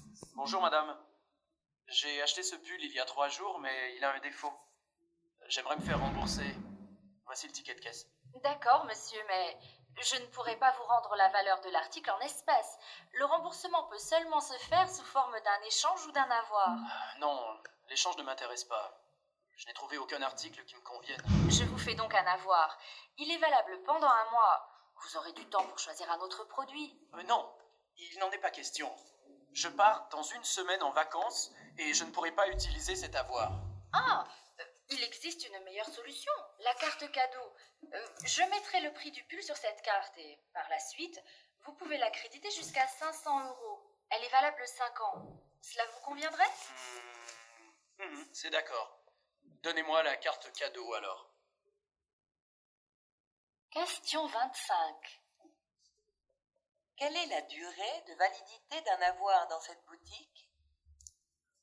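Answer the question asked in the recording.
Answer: Un mois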